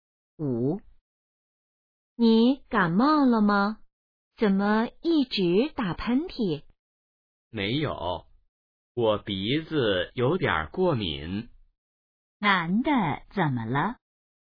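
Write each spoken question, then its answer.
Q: 男的怎么了?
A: 鼻子过敏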